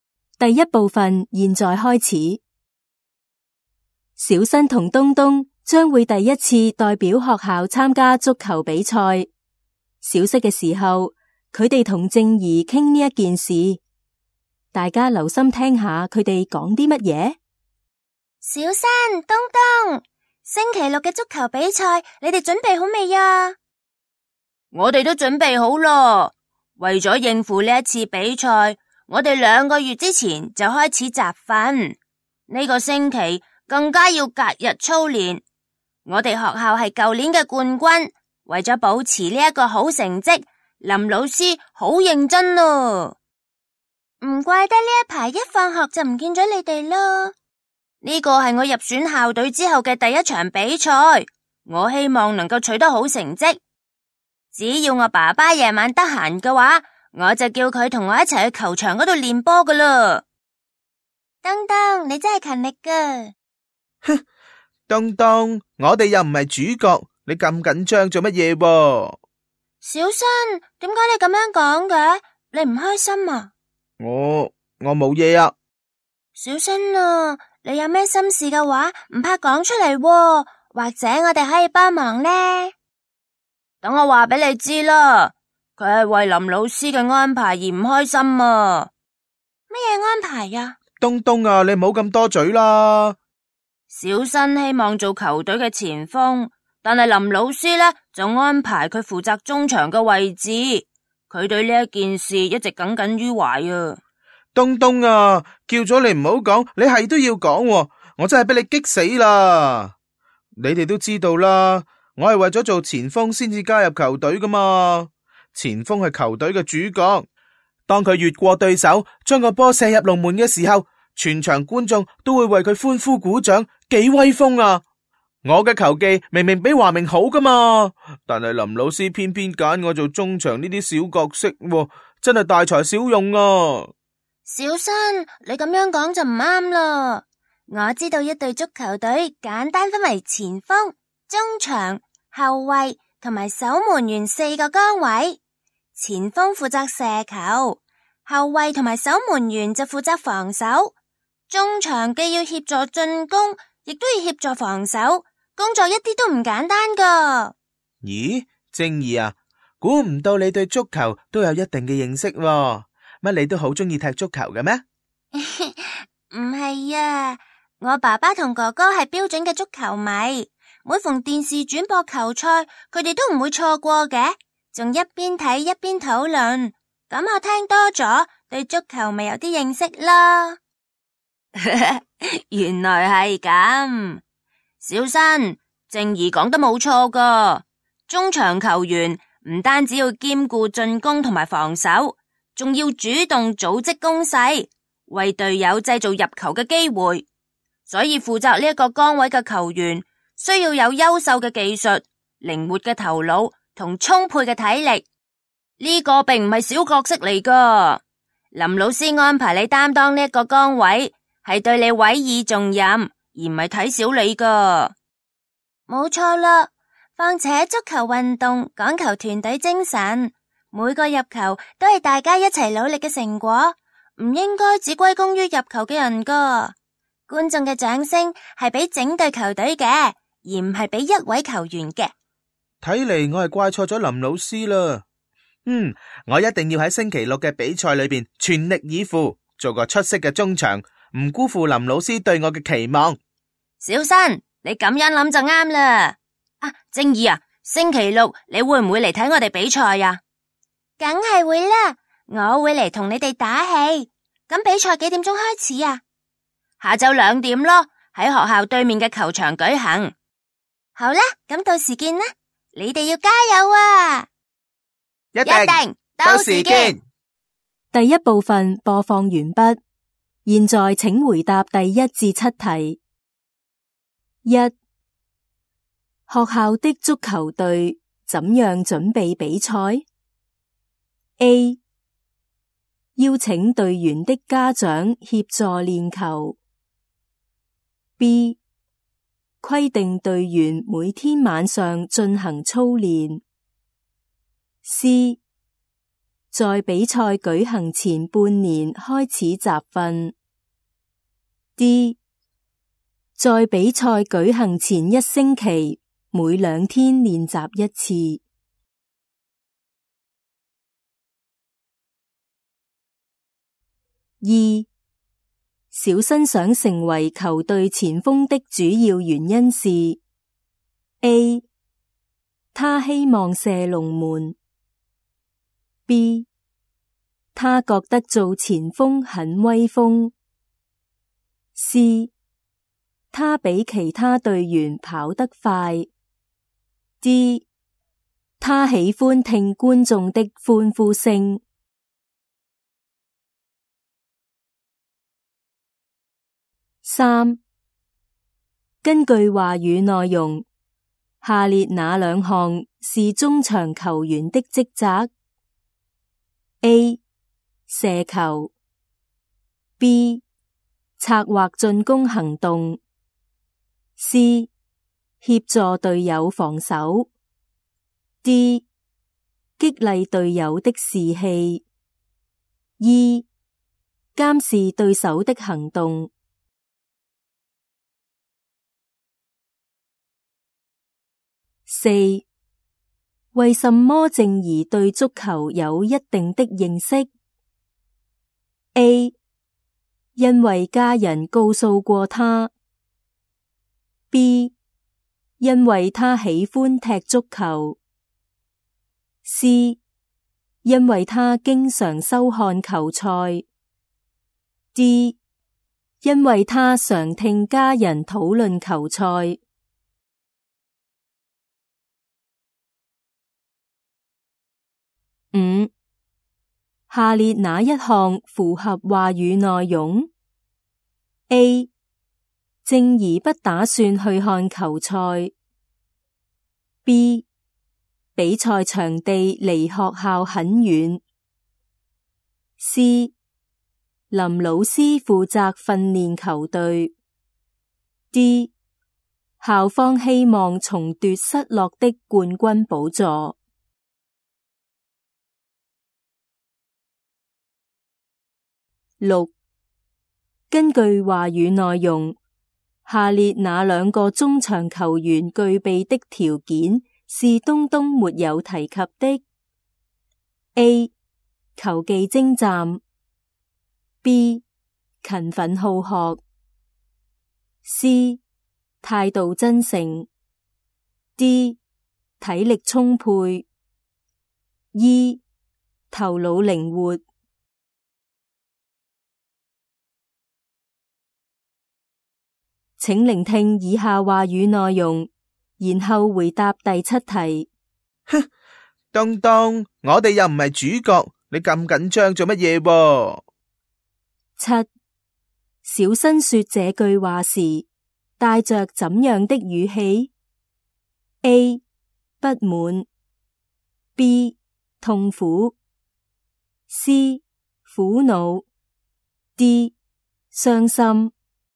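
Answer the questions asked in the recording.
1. D: 在比赛举行前一星期每两天练习一次。
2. B: 他觉得做前锋很威风。
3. B: 策划进攻行动。 C: 协助队友防守。
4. D: 因为他常听家人讨论球赛。
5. C: 林老师负责训练球队。
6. B: 勤奋好学。 C: 态度真诚。
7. A: 不满。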